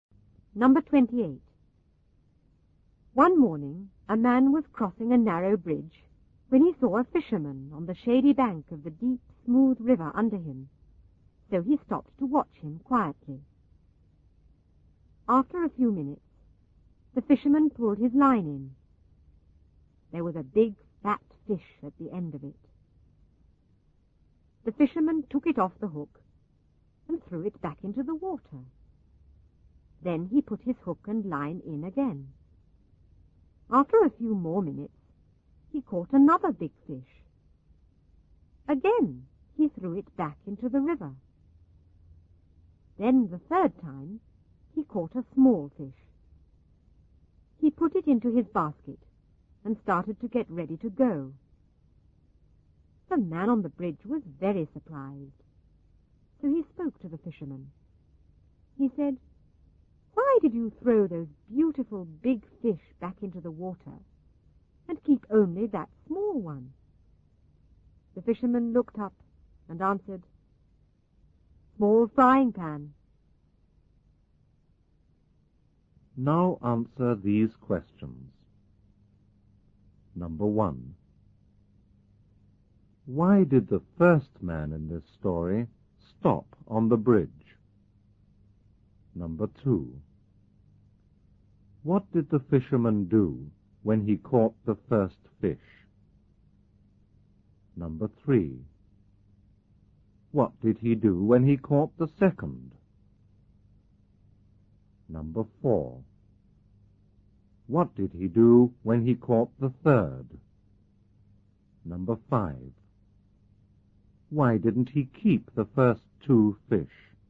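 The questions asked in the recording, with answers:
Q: Why did the first man in this story stop on the bridge?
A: To watch the fisherman

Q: What did the fisherman do when he caught the first fish?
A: He threw it back into the water

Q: What did he do when he caught the second?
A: He threw it back into the river

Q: What did he do when he caught the third?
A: He put it into his basket and got ready to go

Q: Why didn't he keep the first two fish?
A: Because his frying pan was small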